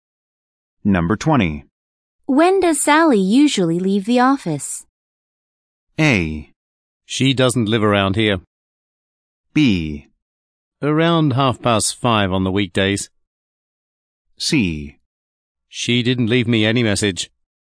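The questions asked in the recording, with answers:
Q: When does Sally usually leave the office?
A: B: Around 5:30 on the weekdays.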